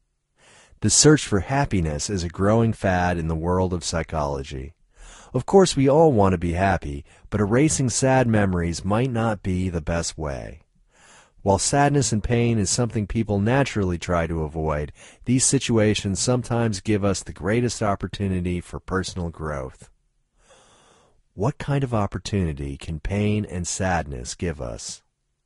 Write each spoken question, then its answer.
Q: What kind of opportunity can pain and sadness give us?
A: Pain and sadness can give us an opportunity for personal growth.